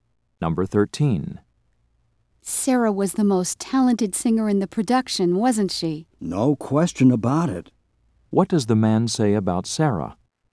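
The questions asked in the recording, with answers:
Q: What does the man say about Sarah?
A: She was definitely the most talented singer.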